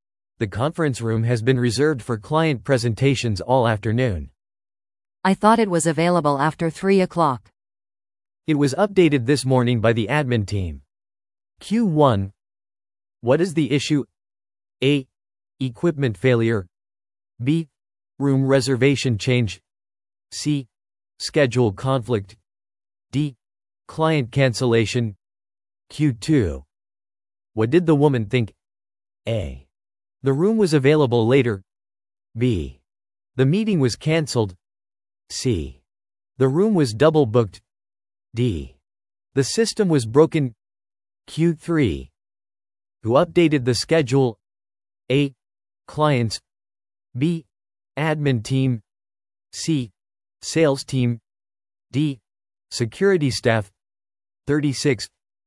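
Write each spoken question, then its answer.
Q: What did the woman think?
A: A: The room was available later.

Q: Who updated the schedule?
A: B: Admin team.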